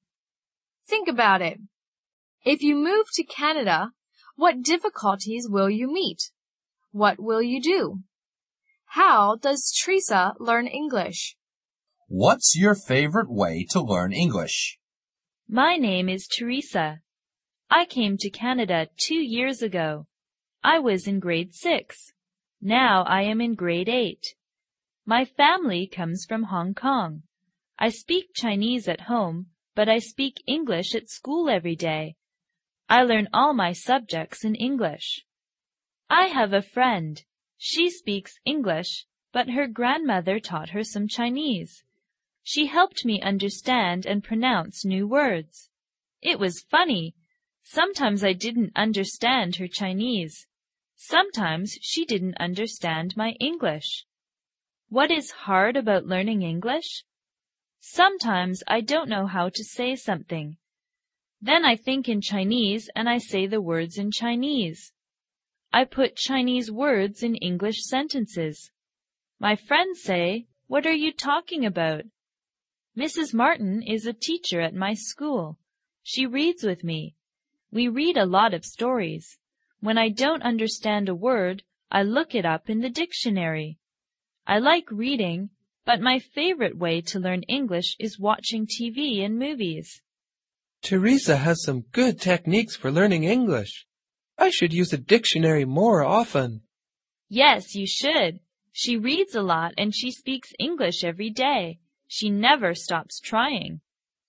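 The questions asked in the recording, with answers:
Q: How does Teresa learn English?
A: She speaks English at school every day, reads stories with her teacher, looks up words in a dictionary, and watches TV and movies.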